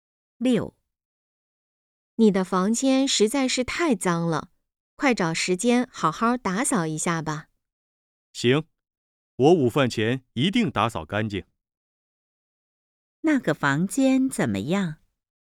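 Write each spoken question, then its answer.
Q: 那个房间怎么样?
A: 很脏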